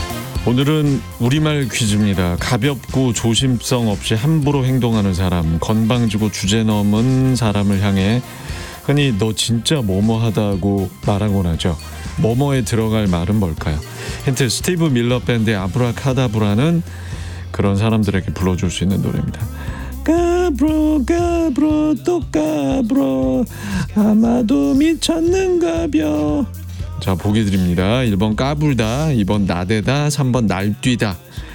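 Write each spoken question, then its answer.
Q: 뭐뭐에 들어갈 말은 뭘까요?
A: 1번: 까불다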